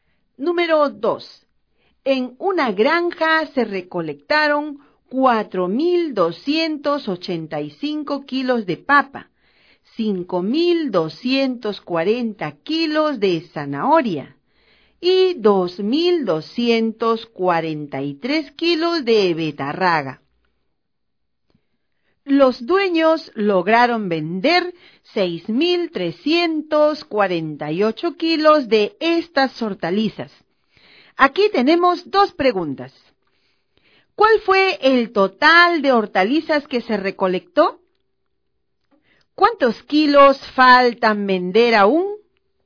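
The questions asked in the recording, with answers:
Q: ¿Cuál fue el total de hortalizas que se recolectó?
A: 11.768 kilos

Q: ¿Cuántos kilos faltan vender aún?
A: 5.420 kilos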